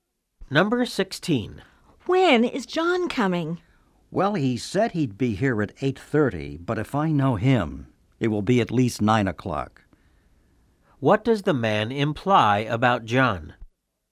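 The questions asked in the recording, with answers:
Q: What does the man imply about John?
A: John is usually late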